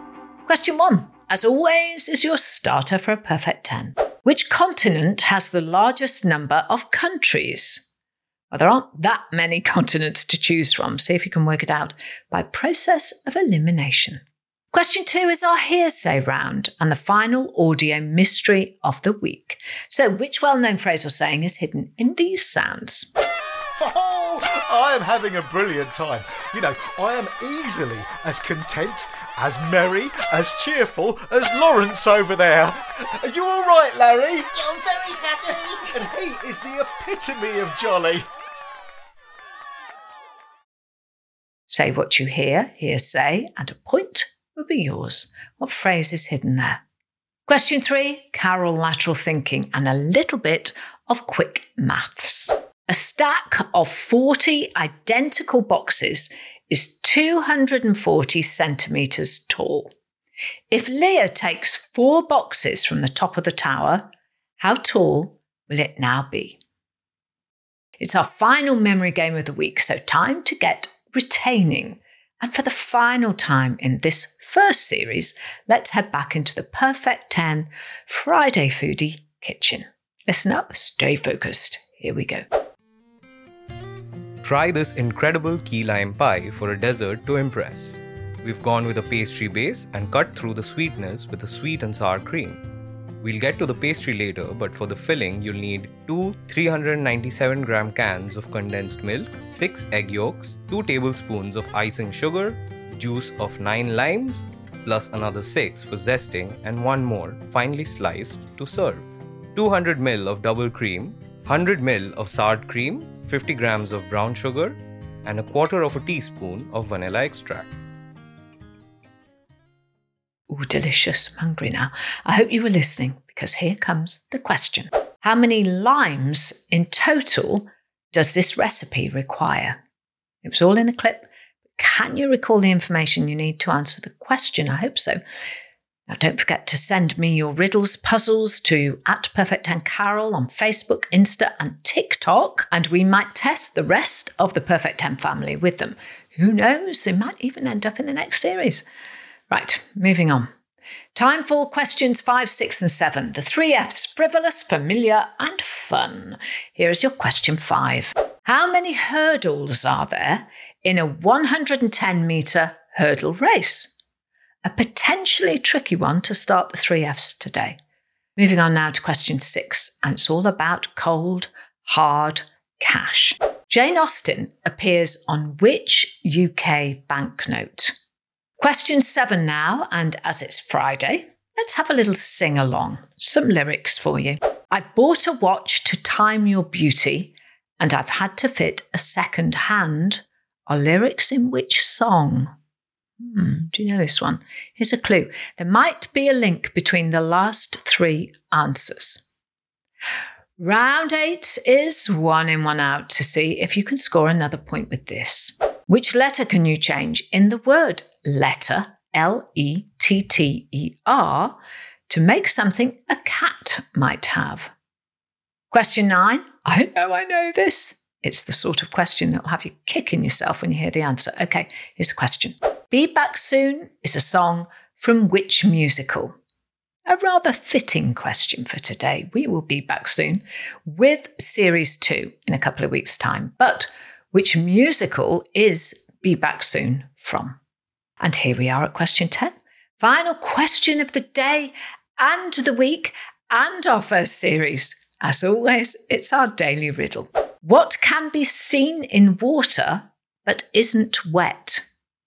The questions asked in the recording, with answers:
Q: What phrase is hidden there?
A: And the answer hidden in that clip was, as happy as Larry.

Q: If Leah takes four boxes from the top of the tower, how tall will it now be?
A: Well, the answer is 216 centimetres tall, or 2.16 metres, if you want to put it that way.

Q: How many limes in total does this recipe require?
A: the answer is a total of 16 limes.